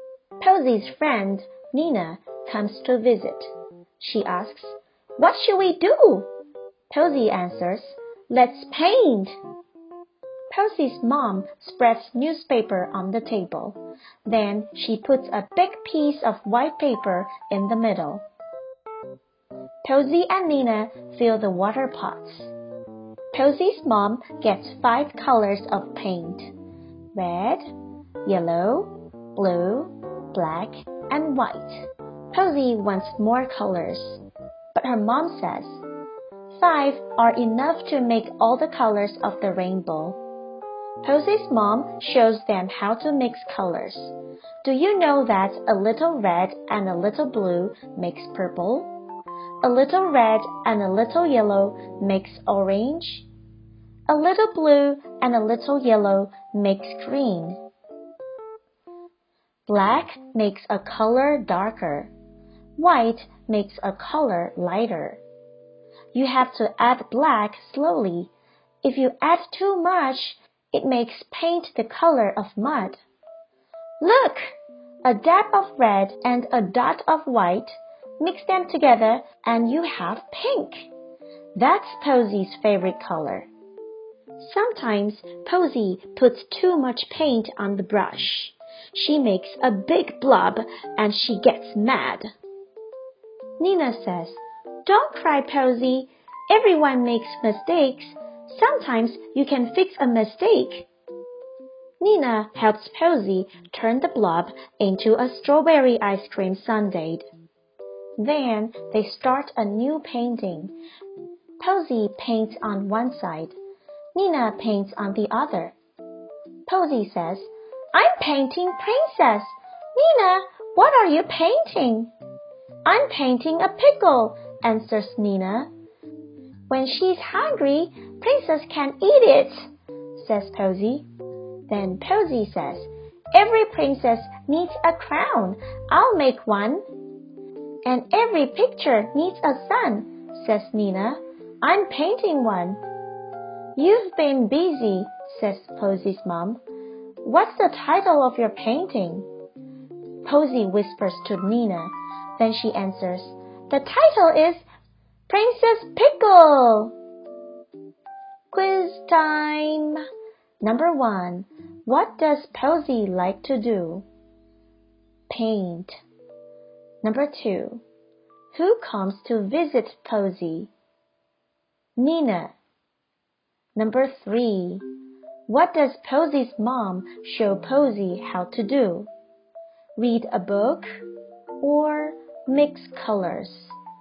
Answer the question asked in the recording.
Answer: The answer is mix colors.